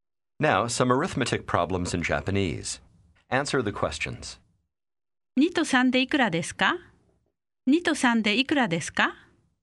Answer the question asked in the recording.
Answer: 5 2と3で5です。